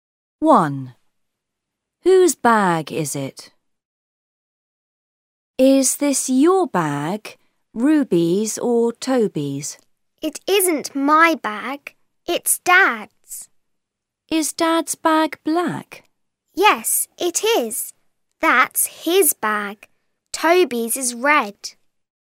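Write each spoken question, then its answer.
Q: Whose bag is it?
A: Dad's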